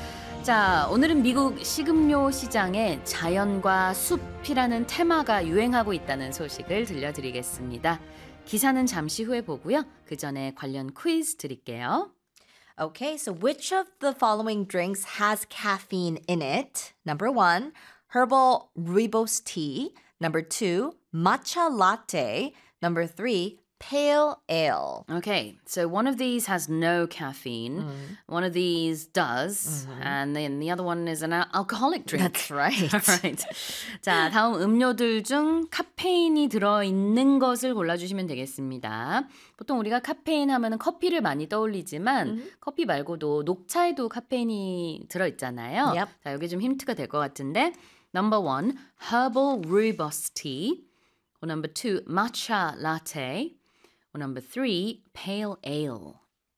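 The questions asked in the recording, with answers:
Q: Okay, so which of the following drinks has caffeine in it?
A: 2: matcha latte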